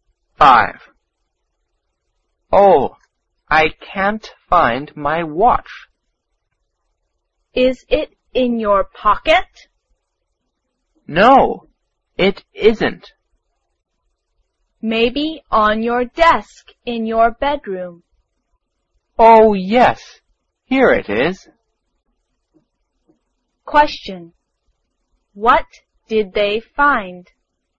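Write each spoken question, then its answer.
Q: What did they find?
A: A watch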